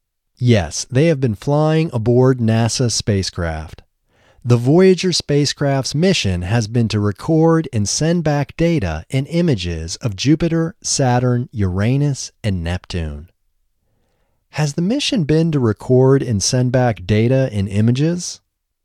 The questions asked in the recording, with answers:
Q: Has the mission been to record and send back data and images?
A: Yes, the mission has been to record and send back data and images.